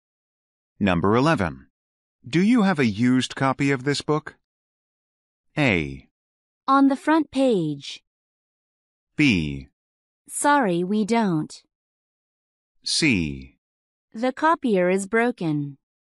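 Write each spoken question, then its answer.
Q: Do you have a used copy of this book?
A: B: Sorry, we don't.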